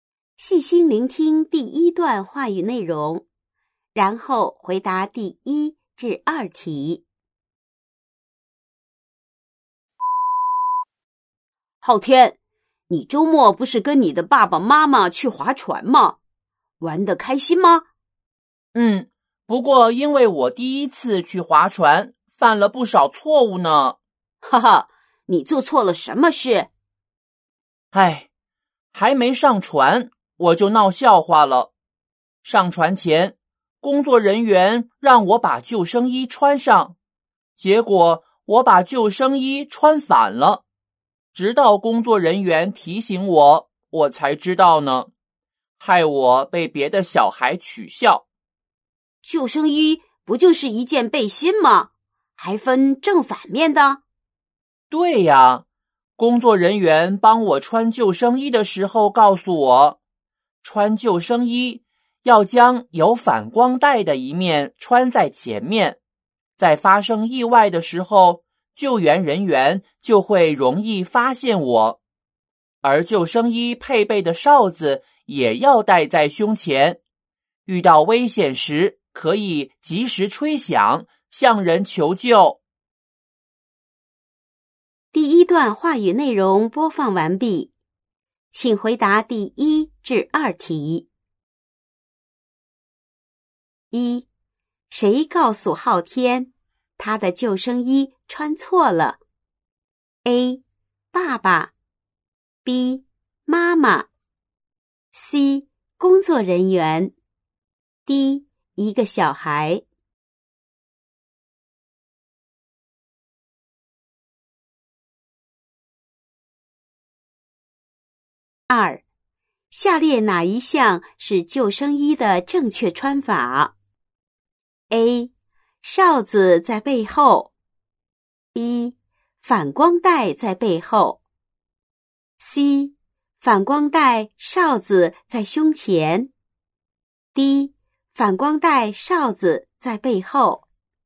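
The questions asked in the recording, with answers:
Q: 谁告诉昊天,他的救生衣穿错了?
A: C: 工作人员

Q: 下列哪一项是救生衣的正确穿法?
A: C: 反光带哨子在胸前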